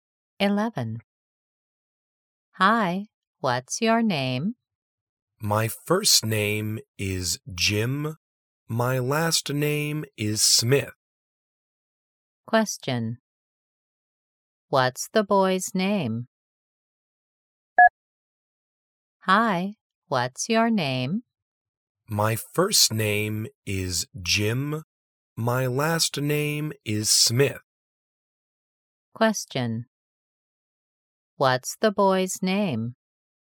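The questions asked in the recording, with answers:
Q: What's the boy's name?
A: Jim Smith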